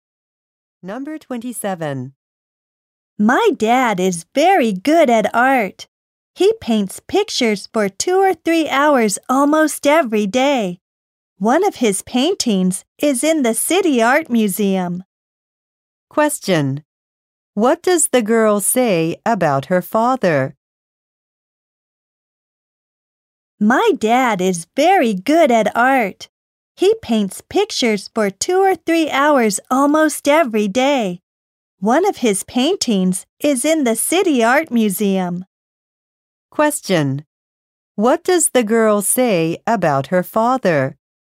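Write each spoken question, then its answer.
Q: Question. What does the girl say about her father?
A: He is very good at art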